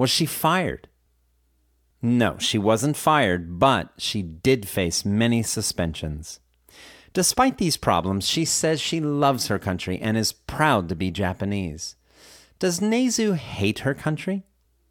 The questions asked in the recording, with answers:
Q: Does Nezu hate her country?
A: No, Nezu doesn't hate her country.